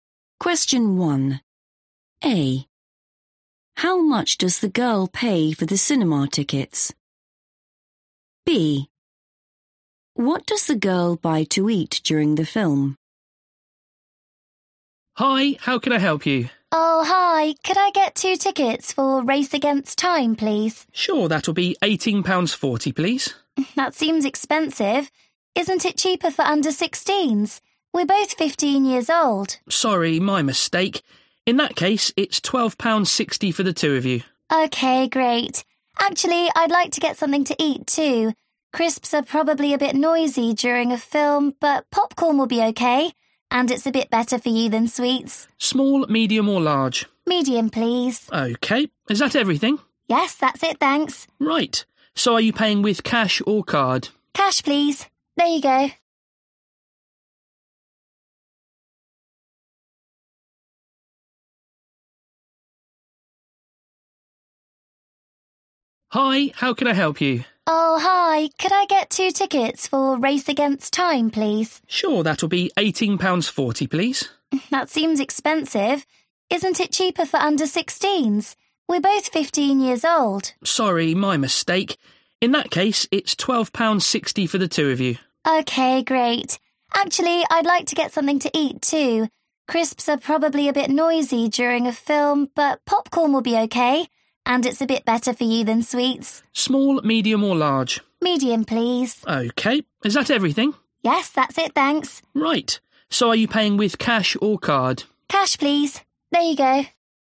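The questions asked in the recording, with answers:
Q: How much does the girl pay for the cinema tickets?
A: £12.60

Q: What does the girl buy to eat during the film?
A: popcorn (medium)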